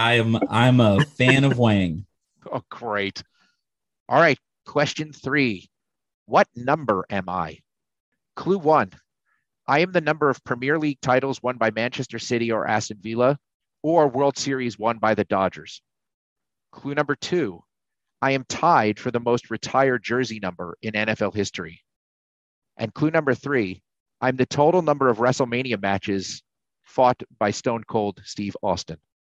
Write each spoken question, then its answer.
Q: what number am I?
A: So yes, it is in fact seven.